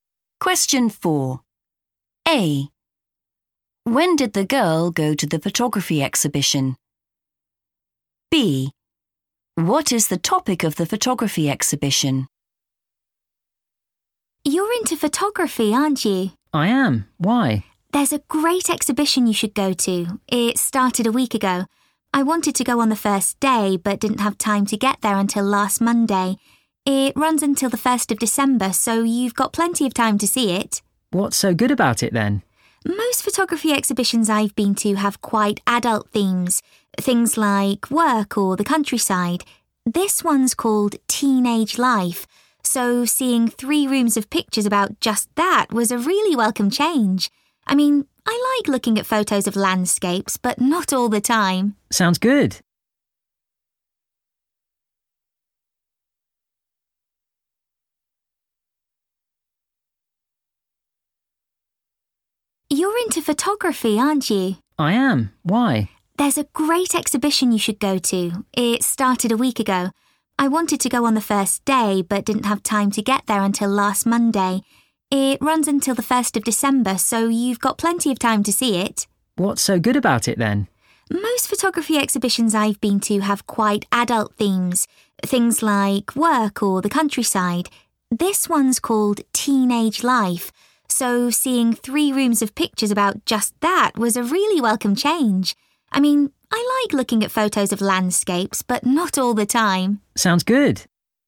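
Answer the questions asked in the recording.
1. last Monday
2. teenage life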